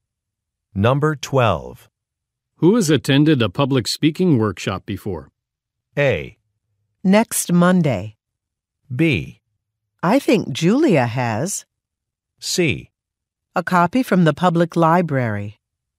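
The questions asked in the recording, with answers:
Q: Who has attended a public speaking workshop before?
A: B: I think Julia has.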